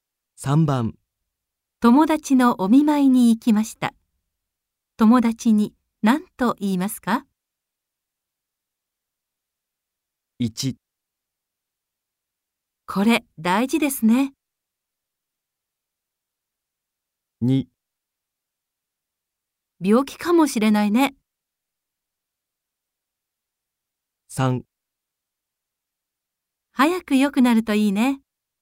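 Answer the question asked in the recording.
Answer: 3: 早く良くなるといいね。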